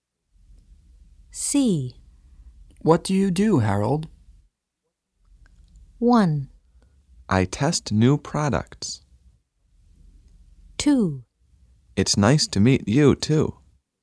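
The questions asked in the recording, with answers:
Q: What do you do, Harold?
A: 1: I test new products.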